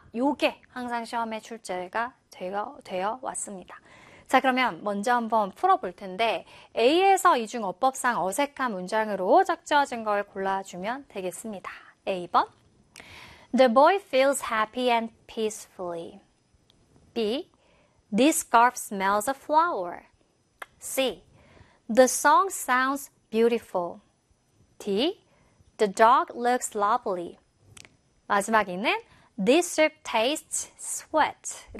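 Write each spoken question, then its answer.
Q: A에서 이중 어법상 어색한 문장으로 적절한 걸 골라주면 되겠습니다.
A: A: The boy feels happy and peacefully.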